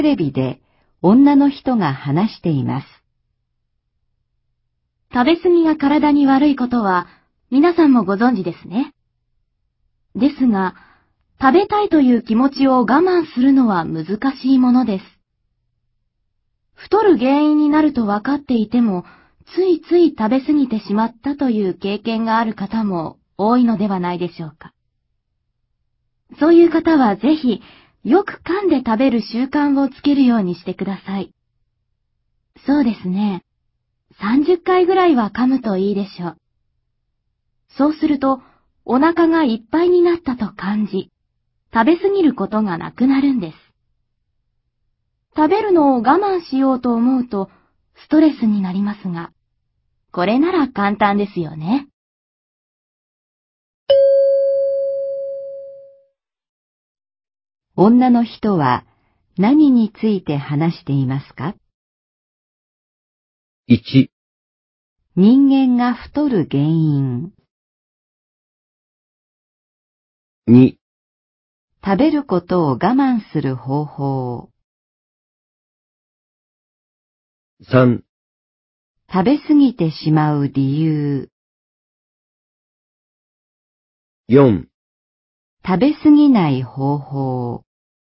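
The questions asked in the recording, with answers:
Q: 女の人は何について話していますか?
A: 4: 食べ過ぎない方法。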